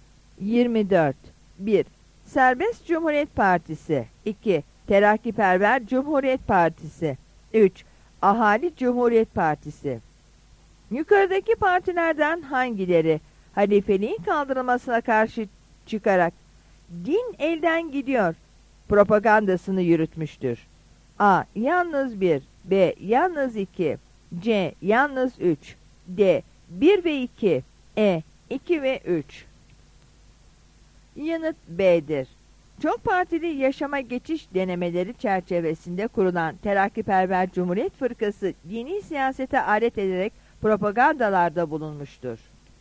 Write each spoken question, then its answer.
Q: Yukarıdaki partilerden hangileri halifeliğin kaldırılmasına karşı çıkarak din elden gidiyor propagandasını yürütmüştür?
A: Yanıt B'dir.